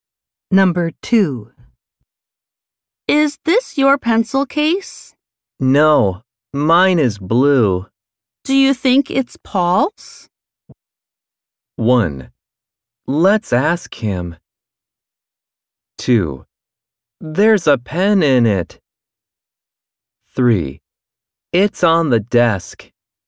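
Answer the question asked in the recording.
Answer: 1: Let's ask him.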